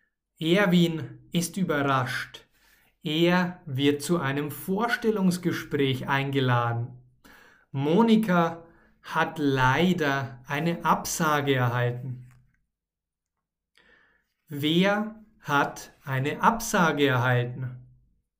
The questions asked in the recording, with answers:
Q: Wer hat eine Absage erhalten?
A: Monika. Monika hat leider eine Absage erhalten.